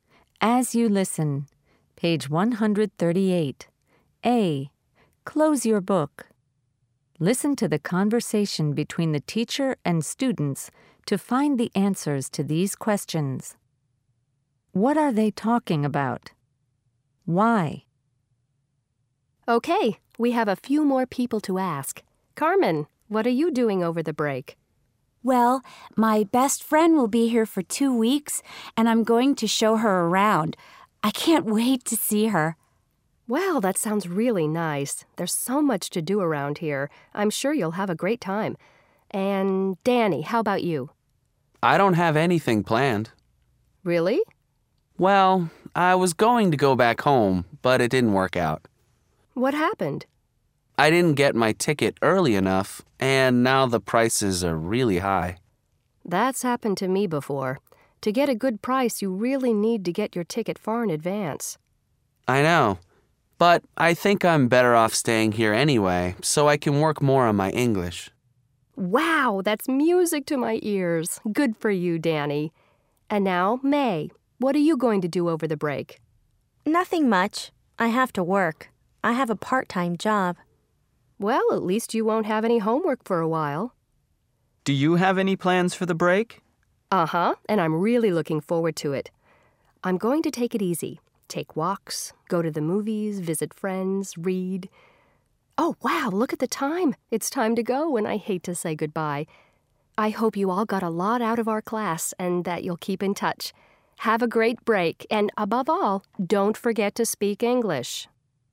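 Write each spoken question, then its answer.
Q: What are they talking about?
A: Their plans for the break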